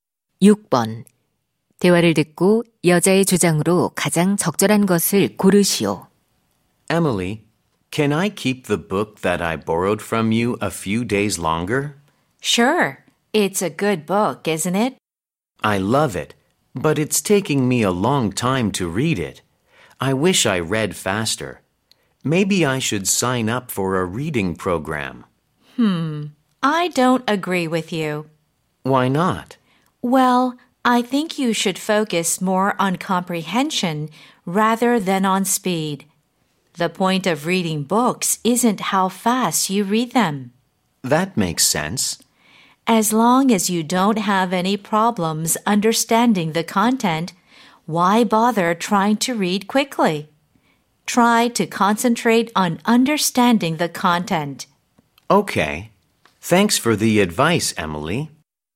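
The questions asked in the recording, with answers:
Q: 대화를 듣고 여자의 주장으로 가장 적절한 것을 고르시오.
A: 책은 빨리 읽기보다 내용 이해에 집중해야 한다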